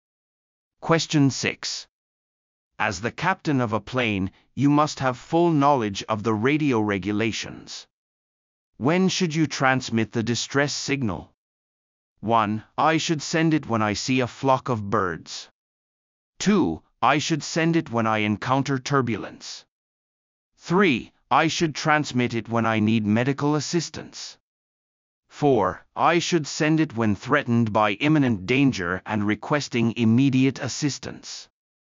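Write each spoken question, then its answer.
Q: When should you transmit the distress signal?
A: 4: I should send it when threatened by imminent danger and requesting immediate assistance.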